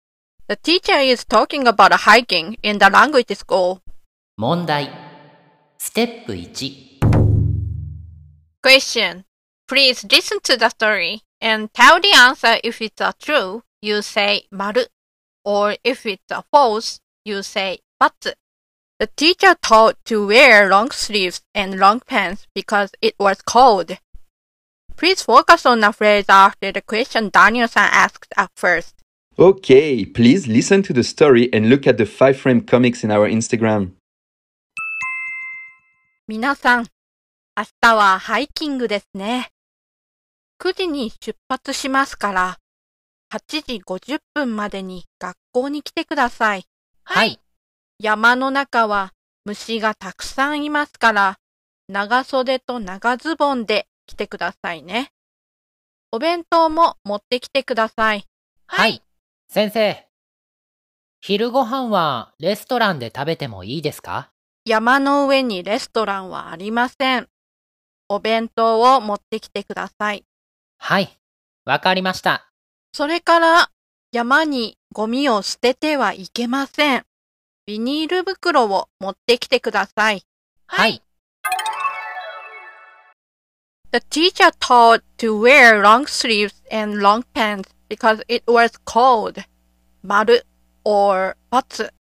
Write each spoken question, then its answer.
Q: The teacher taught to wear long sleeves and long pants because it was cold.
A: So the answer is batsu.